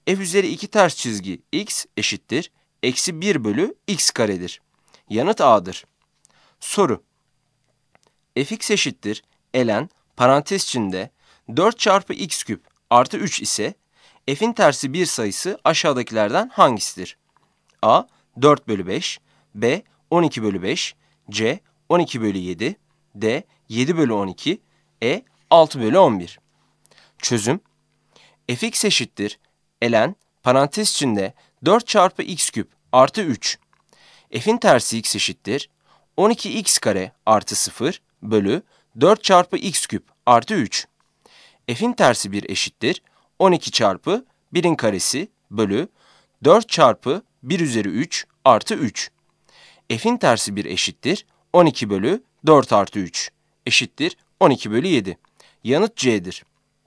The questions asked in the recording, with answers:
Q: Fx eşittir ln parantez içinde 4 çarpı x küp artı 3 ise f'in tersi 1 sayısı aşağıdakilerden hangisidir?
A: Yanıt C'dir.